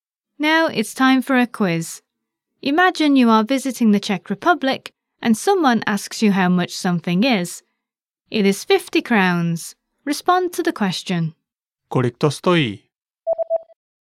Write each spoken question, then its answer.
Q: Kolik to stojí?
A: Stojí to 50 korun.